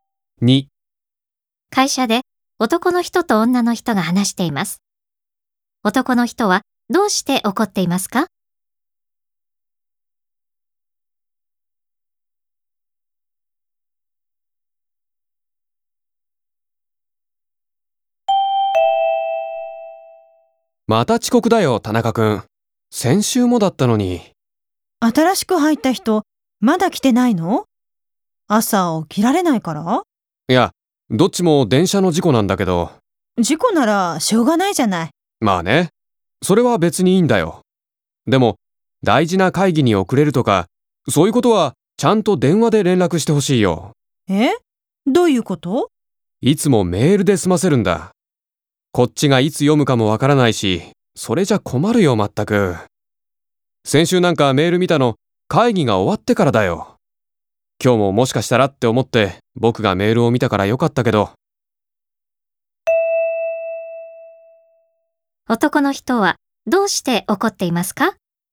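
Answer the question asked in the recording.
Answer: 田中君が遅れるとき、電話ではなくメールで連絡するから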